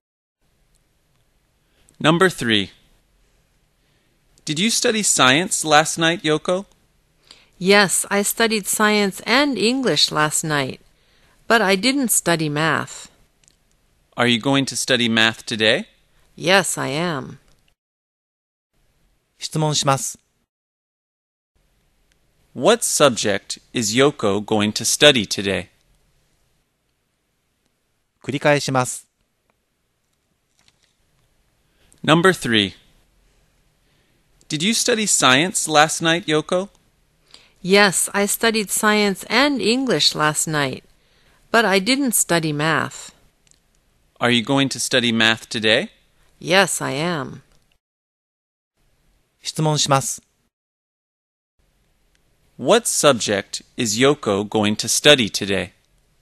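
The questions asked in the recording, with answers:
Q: What subject is Yoko going to study today?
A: Math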